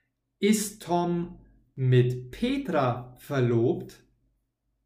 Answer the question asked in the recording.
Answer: Nein. Er ist nicht mit Petra verlobt.